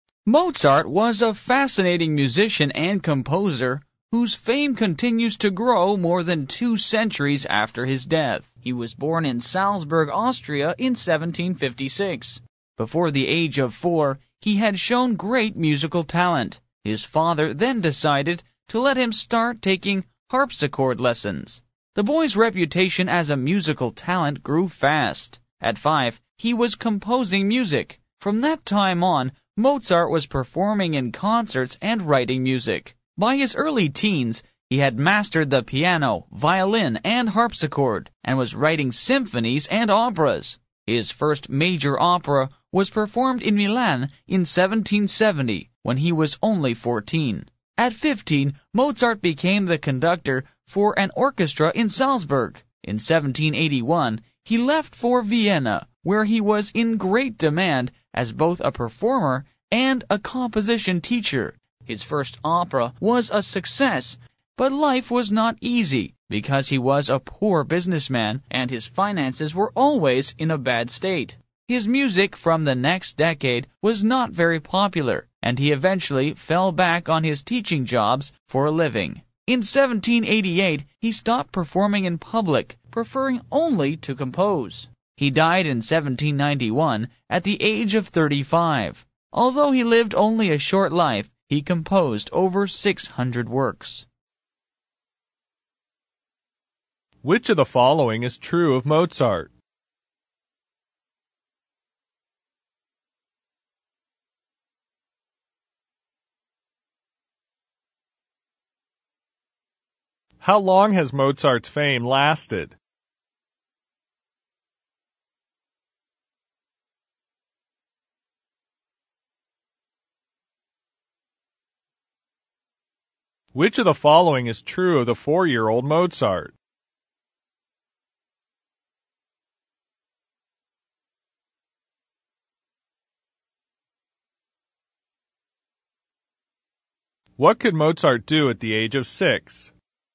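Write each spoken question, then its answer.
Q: How long has Mozart's fame lasted?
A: More than two centuries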